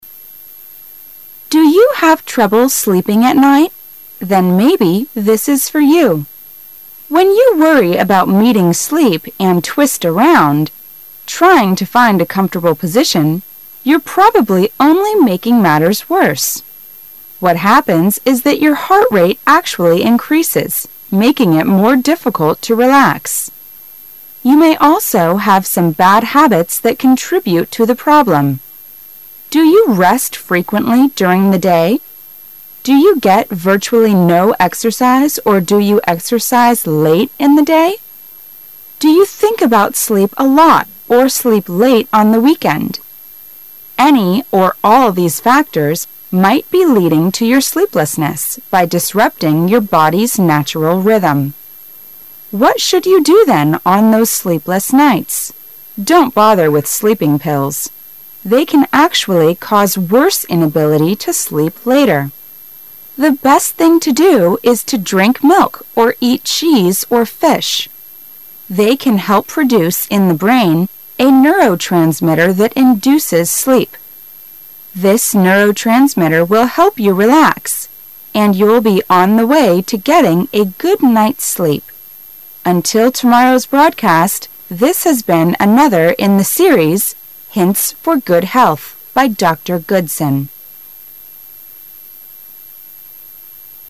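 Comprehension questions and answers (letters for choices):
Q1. It will be more difficult to relax yourself, if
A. you do physical exercises late in the day.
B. you have sleeping pills.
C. your heart rate increases.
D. you rest frequently during the day.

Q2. What is the best thing to do on sleepless night?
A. To take some sleeping pills.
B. To drink milk or eat cheese or fish.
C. To find a comfortable position in bed.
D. To do physical exercises.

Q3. What will tomorrow's broadcast be about?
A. Neurotransmitter.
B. Body's natural rhythm.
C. How to keep health.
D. Hints for good health.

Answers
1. C
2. B
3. D

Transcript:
Then, maybe, this is for you. When you worry about meeting sleep and twist around, trying to find a comfortable position, you're probably only making matters worse. What happens is that your heart rate actually increases, making it more difficult to relax. You may also have some bad habits that contribute to the problem. 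Do you rest frequently during the day? Do you get virtually no exercise or do your exercise late in the day? Do you think about sleep a lot or sleep late on the weekend? Any of all these factors might be leading to your sleeplessness by disrupting your body's natural rhythm. What should you do then on those sleepless nights.'? Don't bother with sleeping pills. They can actually cause worse inability to sleep later. The best thing to do is to drink milk or eat cheese or fish. They can help produce in the brain a neurotransmitter that induces sleep. This neurotransmitter will help you relax and you'll be on the way to getting a good night's sleep. Until tomorrow's broadcast, this has been another in the series" Hints for Good Health" by Dr. Goodson.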